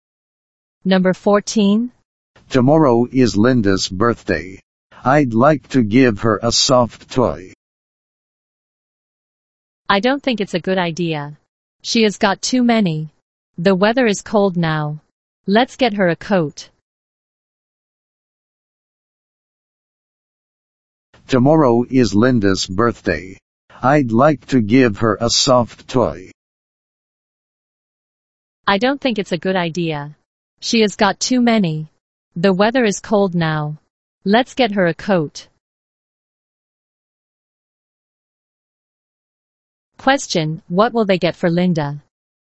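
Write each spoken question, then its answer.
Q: Question, what will they get for Linda?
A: A coat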